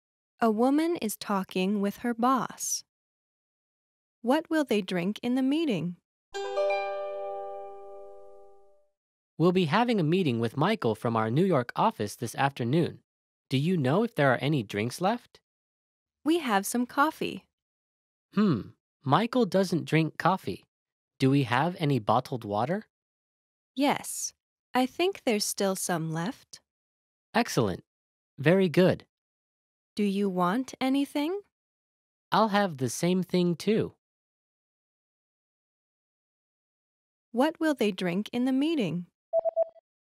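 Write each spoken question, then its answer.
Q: What will they drink in the meeting?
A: Bottled water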